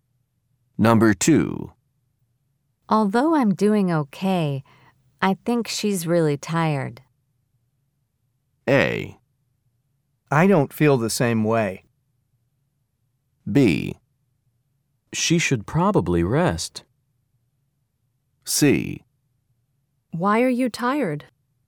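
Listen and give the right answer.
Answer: B: She should probably rest.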